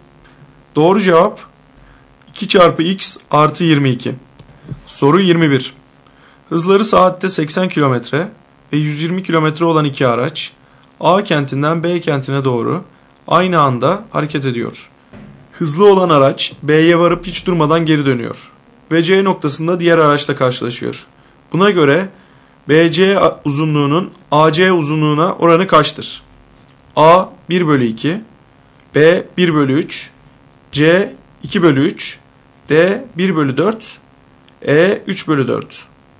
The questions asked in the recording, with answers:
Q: Buna göre BC uzunluğunun AC uzunluğuna oranı kaçtır?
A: Doğru cevap D 1 bölü 4.